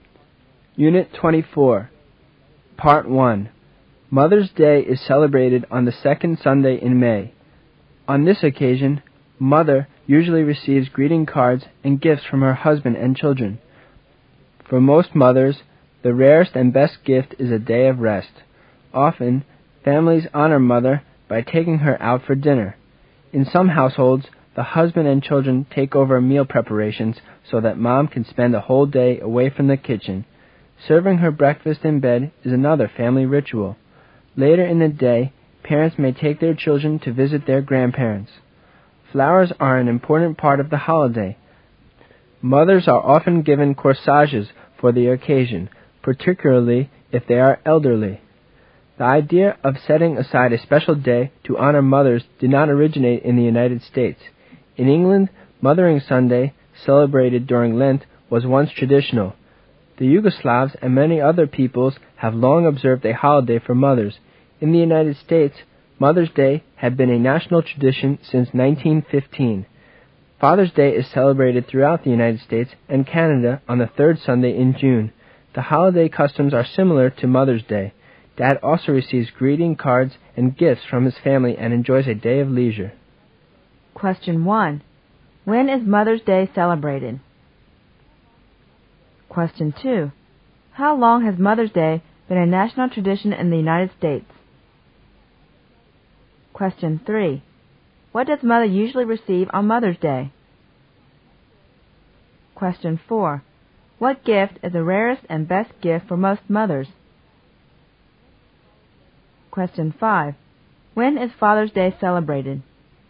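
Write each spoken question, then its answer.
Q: When is Mother's Day celebrated?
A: On the second Sunday in May

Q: How long has Mother's Day been a national tradition in the United States?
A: Since 1915

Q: What does Mother usually receive on Mother's Day?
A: Greeting cards and gifts

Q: What gift is the rarest and best gift for most mothers?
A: A day of rest

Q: When is Father's Day celebrated?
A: On the third Sunday in June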